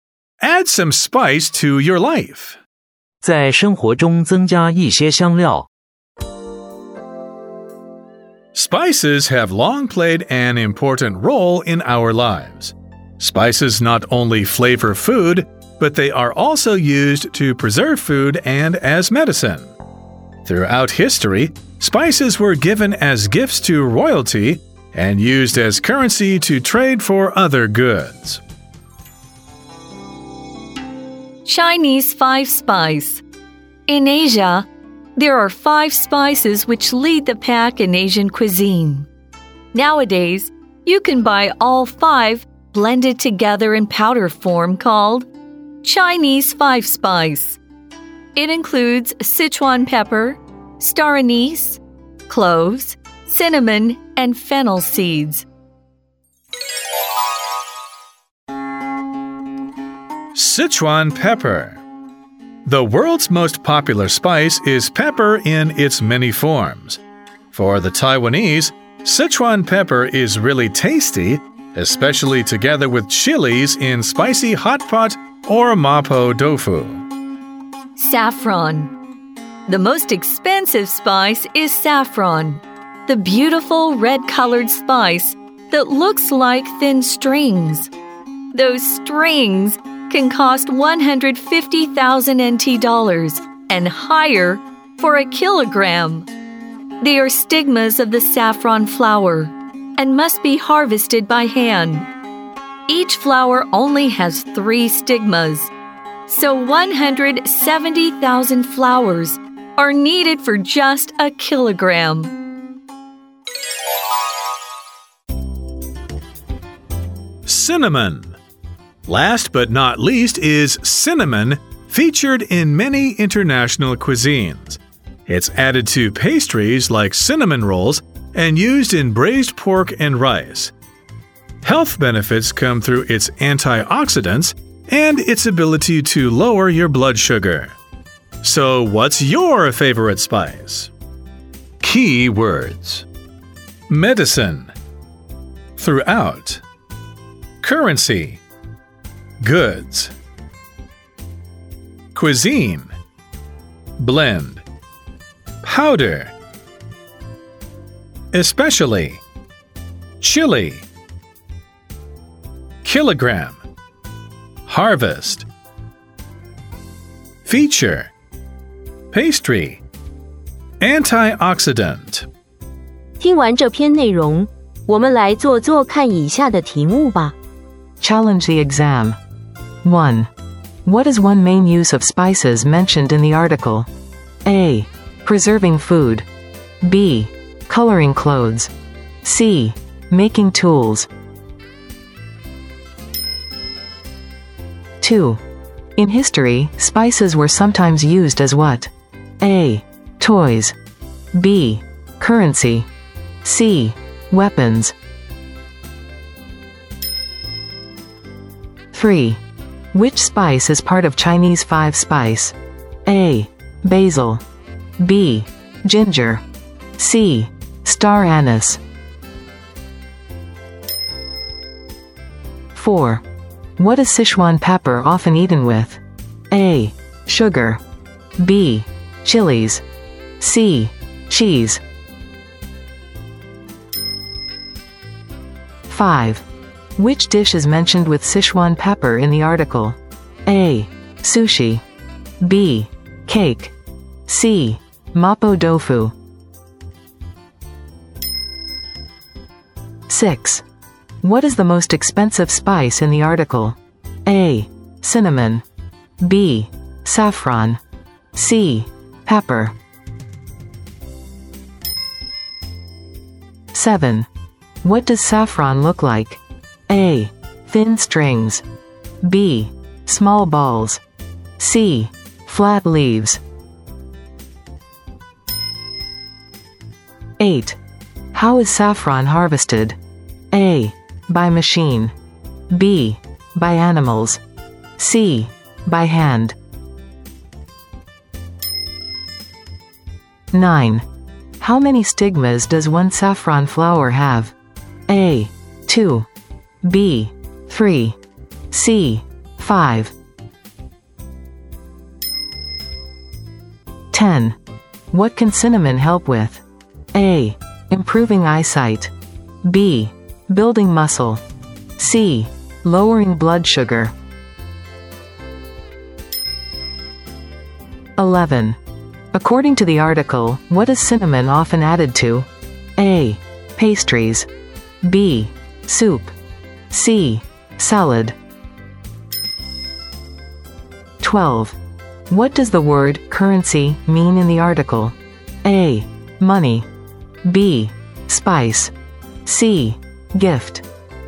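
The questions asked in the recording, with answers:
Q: What is one main use of spices mentioned in the article?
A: A: Preserving food.

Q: In history, spices were sometimes used as what?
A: B: Currency.

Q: Which spice is part of Chinese Five Spice?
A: C: Star anise.

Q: What is Sichuan pepper often eaten with?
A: B: Chilies.

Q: Which dish is mentioned with Sichuan pepper in the article?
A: C: Mapo tofu.

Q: What is the most expensive spice in the article?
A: B: Saffron.

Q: What does saffron look like?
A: A: Thin strings.

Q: How is saffron harvested?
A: C: By hand.

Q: How many stigmas does one saffron flower have?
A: B: 3.

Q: What can cinnamon help with?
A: C: Lowering blood sugar.

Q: According to the article, what is cinnamon often added to?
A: A: Pastries.

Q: What does the word currency mean in the article?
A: A: Money.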